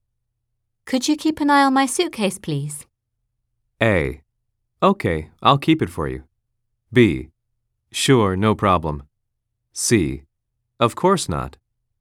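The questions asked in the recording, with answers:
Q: Could you keep an eye on my suitcase, please?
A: B: Sure, no problem.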